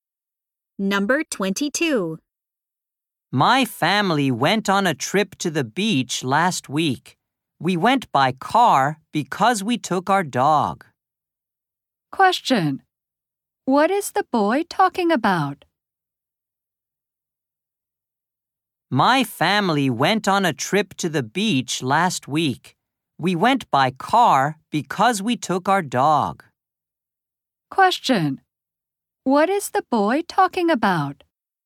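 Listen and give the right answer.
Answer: His family's trip to the beach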